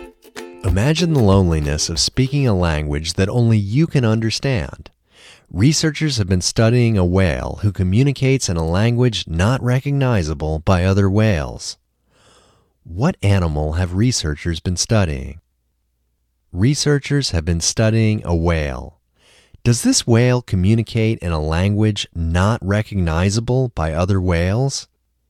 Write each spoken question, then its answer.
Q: Does this whale communicate in a language not recognizable by other whales?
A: Yes, this whale communicates in a language not recognizable by other whales.